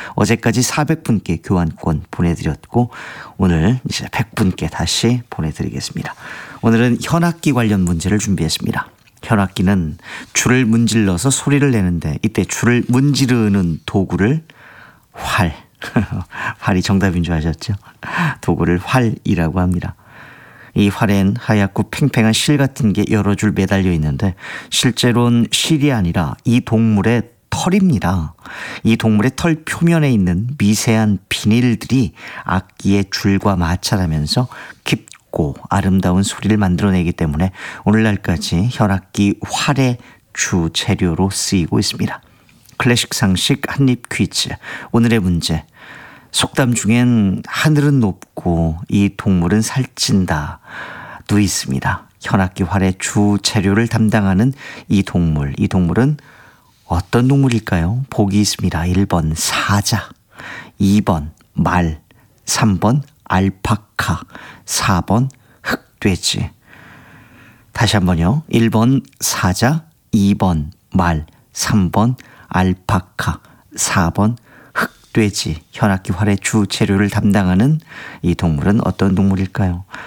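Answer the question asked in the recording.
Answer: 2: 말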